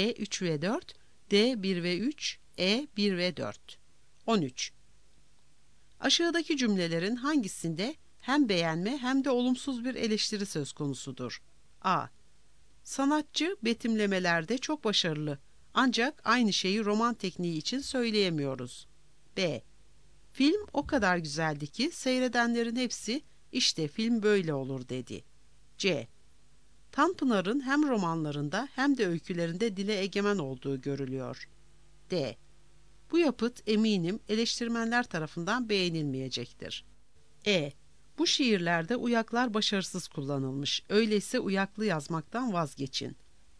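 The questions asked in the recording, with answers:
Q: Aşağıdaki cümlelerin hangisinde hem beğenme hem de olumsuz bir eleştiri söz konusudur?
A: A: Sanatçı betimlemelerde çok başarılı, ancak aynı şeyi roman tekniği için söyleyemiyoruz.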